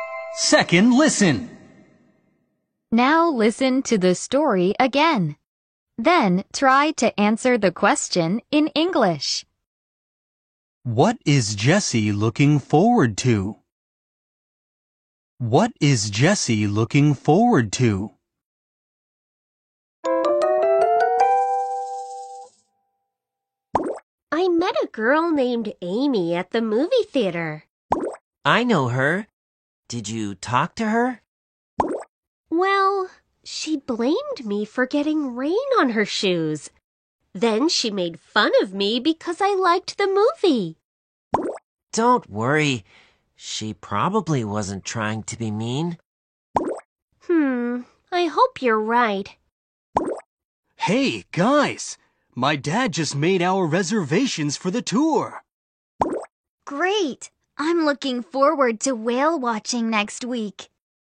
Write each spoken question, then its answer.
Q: What is Jesse looking forward to?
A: The answer is whale watching.